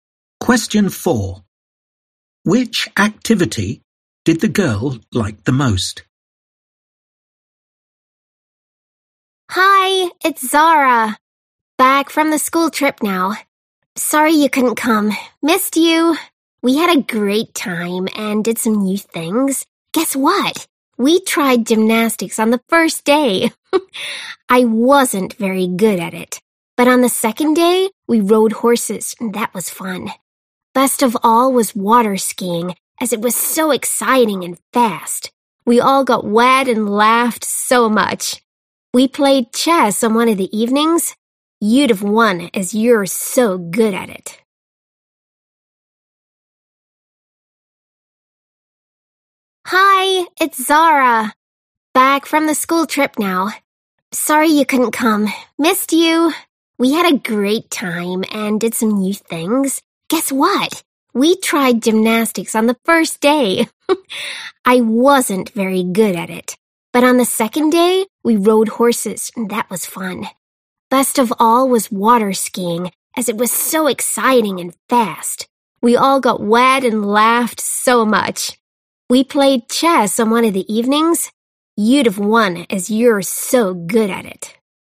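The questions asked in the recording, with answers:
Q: Which activity did the girl like the most?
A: water skiing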